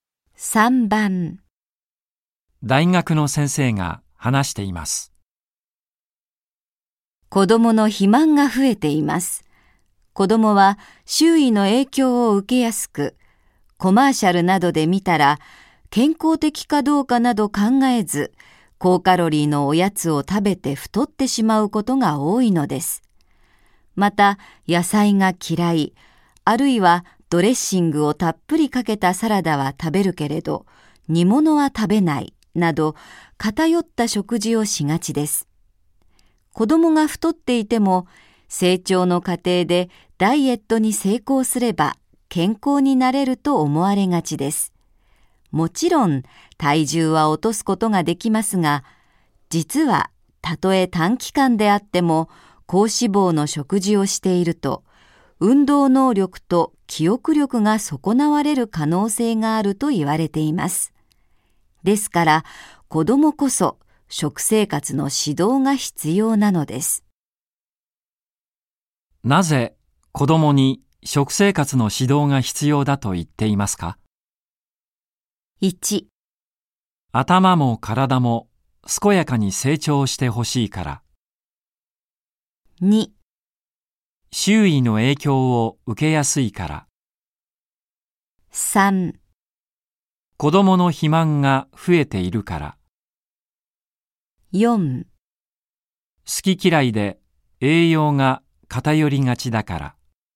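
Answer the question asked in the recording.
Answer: 1: 頭も体も健やかに成長してほしいから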